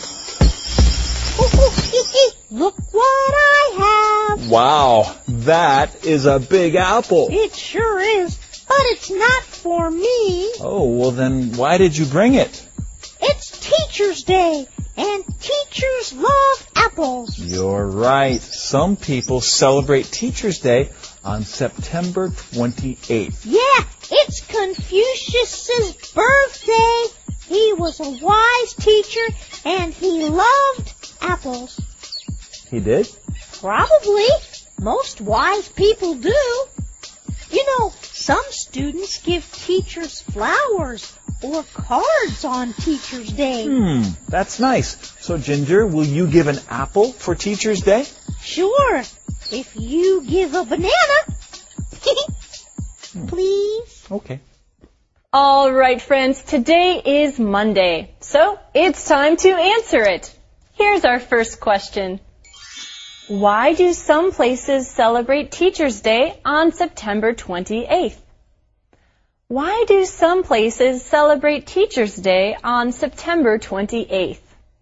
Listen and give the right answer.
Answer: Some places celebrate Teacher's Day on September 28th because it is Confucius's birthday.